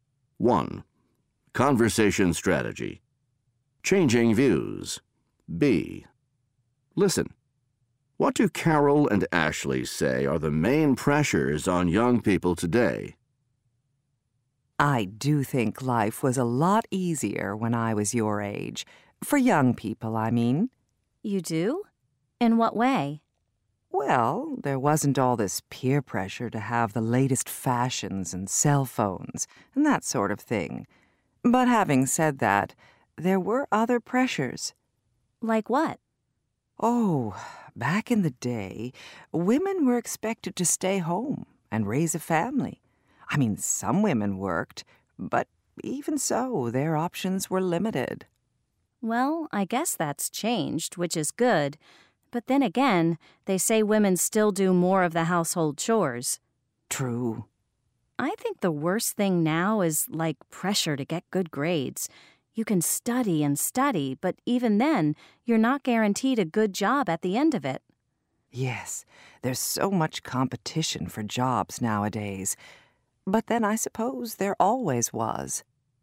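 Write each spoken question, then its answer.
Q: What do Carol and Ashley say are the main pressures on young people today?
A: Peer pressure to have the latest fashions and cell phones, and pressure to get good grades amid competition for jobs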